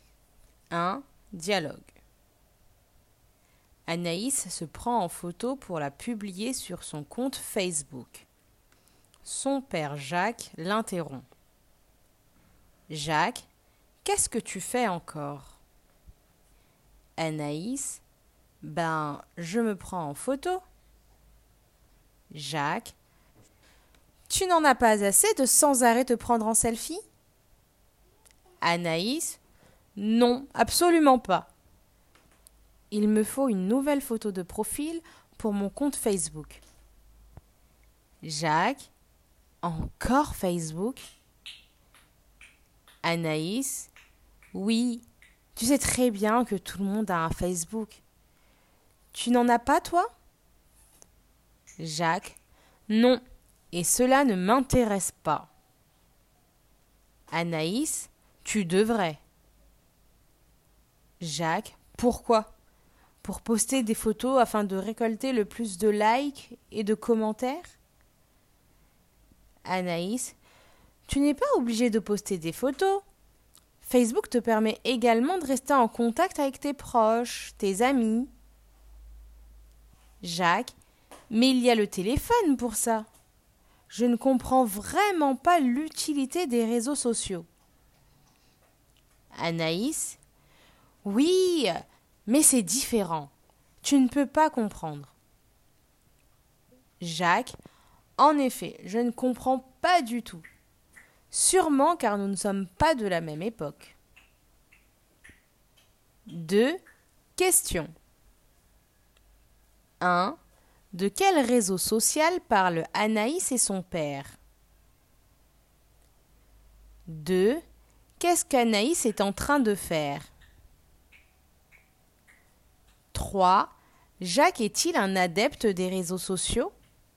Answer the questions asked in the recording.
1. Il parle de Facebook.
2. Elle est en train de se prendre en photo.
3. Non.